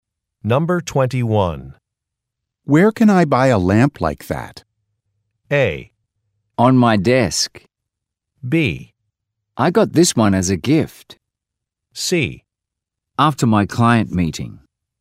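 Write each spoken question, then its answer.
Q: Where can I buy a lamp like that?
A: B: I got this one as a gift.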